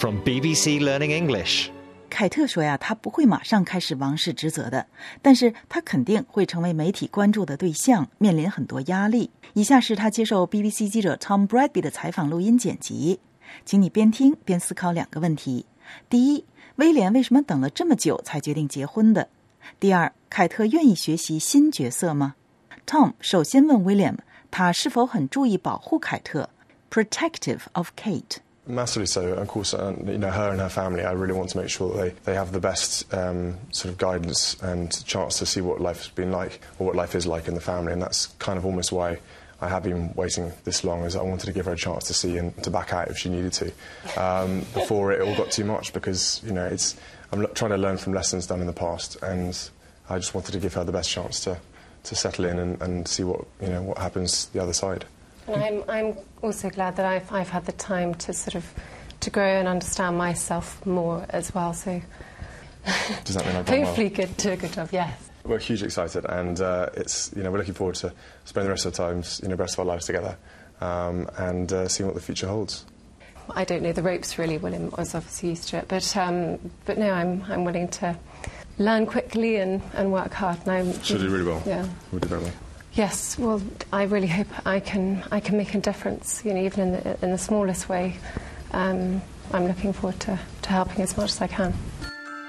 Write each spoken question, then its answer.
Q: 威廉为什么等了这么久才决定结婚的?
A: 因为他想给凯特足够的时间来感受一下王室的生活究竟是什么样的,以免凯特改变主意想退出去 back out。

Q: 凯特愿意学习新角色吗?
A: 是的,他说他愿意努力和快速的学习。